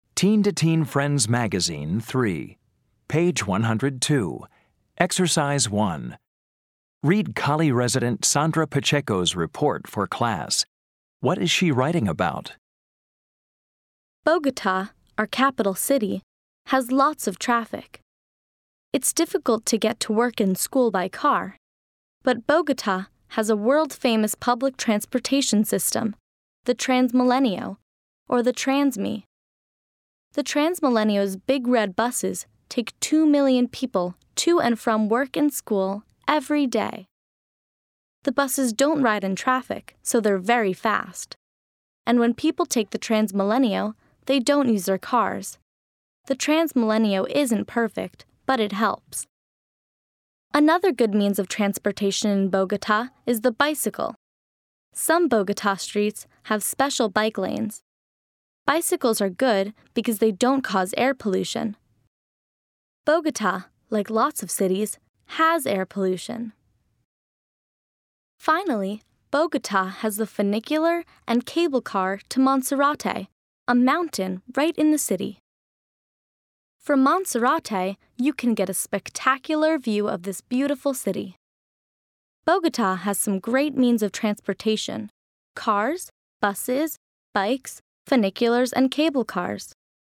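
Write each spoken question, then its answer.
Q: What is she writing about?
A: Means of transportation in Bogota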